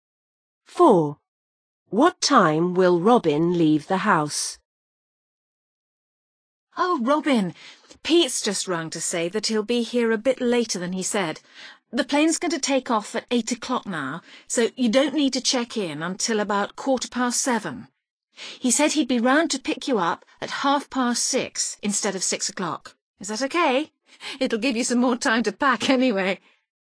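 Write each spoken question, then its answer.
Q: What time will Robin leave the house?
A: 6:30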